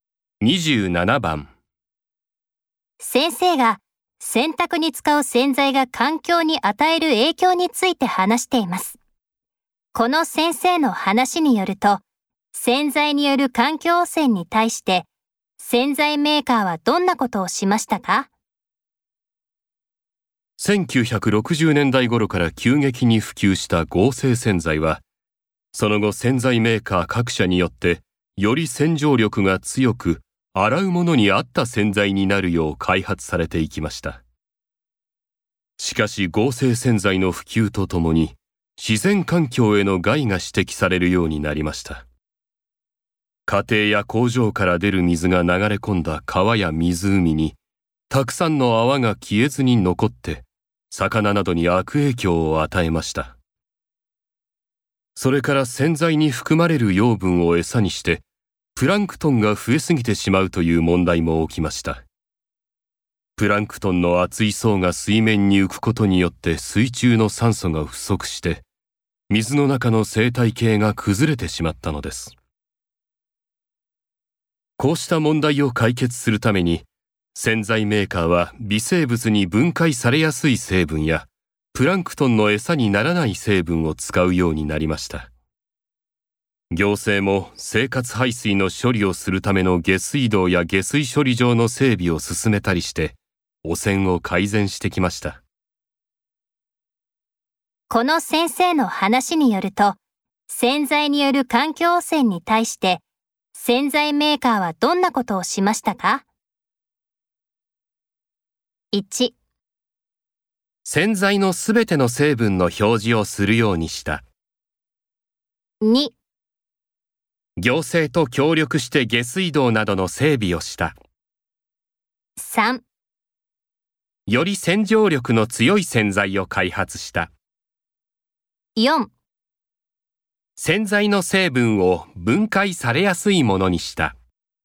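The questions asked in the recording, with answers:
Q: この先生の話によると、洗剤による環境汚染に対して洗剤メーカーはどんなことをしましたか?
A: 4: 洗剤の成分を分解されやすいものにした。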